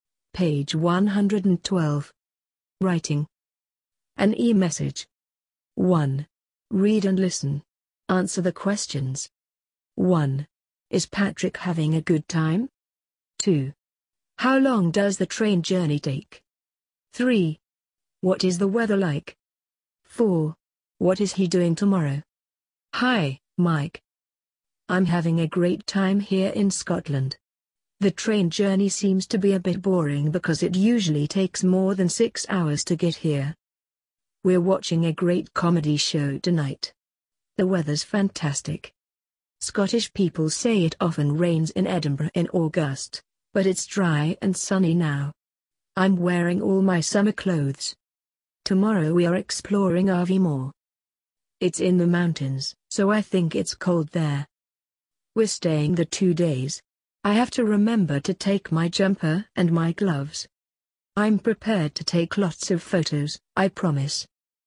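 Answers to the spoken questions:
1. Yes, he's having a great time.
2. More than 6 hours.
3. Dry and sunny.
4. Exploring Aviemore.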